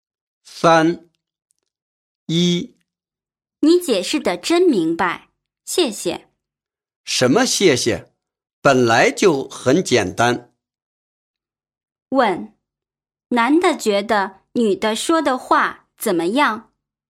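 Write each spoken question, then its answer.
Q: 问,男的觉得女的说的话怎么样?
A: 解释得很明白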